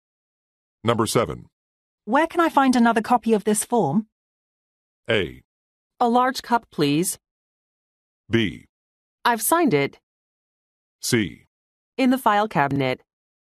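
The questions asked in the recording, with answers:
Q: Where can I find another copy of this form?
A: C: In the file cabinet.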